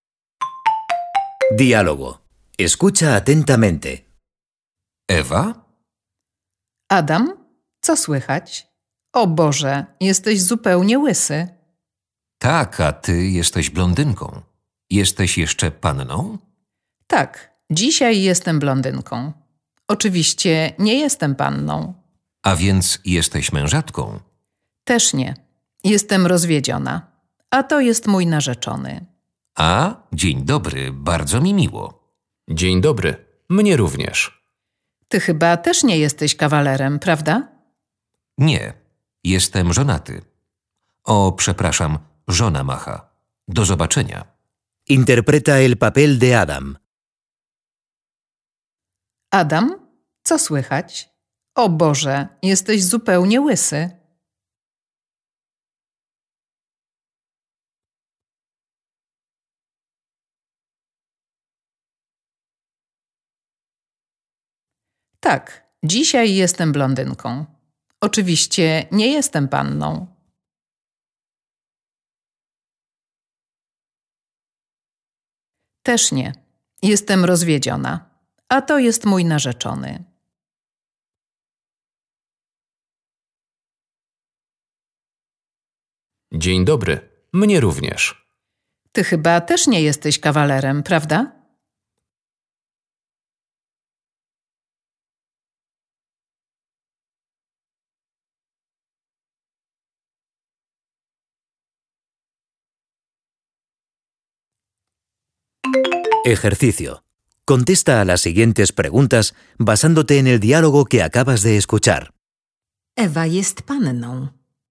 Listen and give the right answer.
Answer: Nie, jest rozwiedziona.